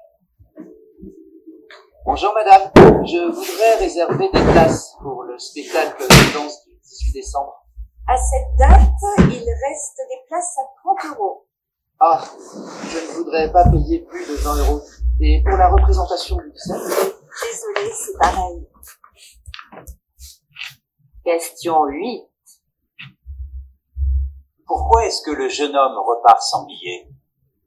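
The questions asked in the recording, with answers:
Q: Pourquoi est-ce que le jeune homme repart sans billets ?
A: Parce que les places sont trop chères (30 euros, il ne veut pas payer plus de 20 euros).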